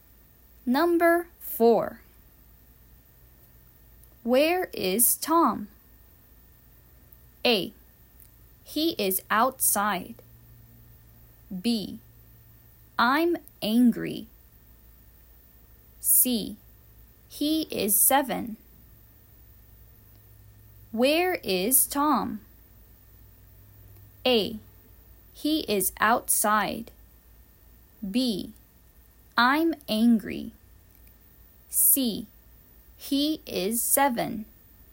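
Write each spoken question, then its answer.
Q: Where is Tom?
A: A: He is outside.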